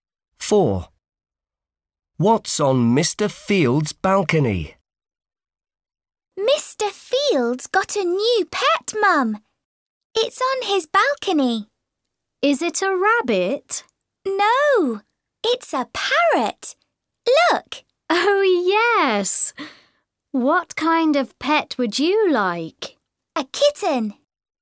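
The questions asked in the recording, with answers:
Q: What's on Mr. Field's balcony?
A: a parrot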